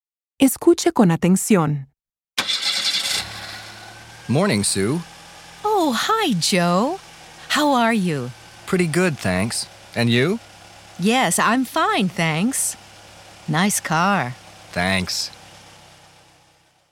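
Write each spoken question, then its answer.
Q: ¿Se conocían estas dos personas?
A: Sí, se conocían (se llaman por su nombre)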